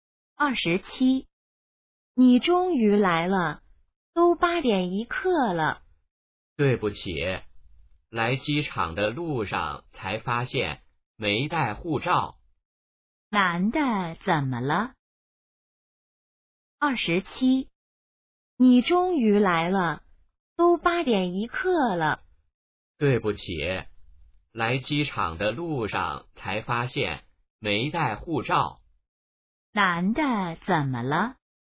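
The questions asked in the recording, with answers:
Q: 男的怎么了?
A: 没带护照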